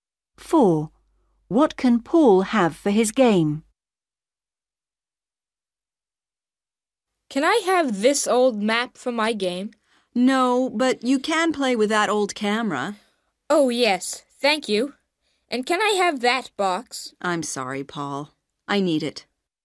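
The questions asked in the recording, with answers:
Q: What can Paul have for his game?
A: the old camera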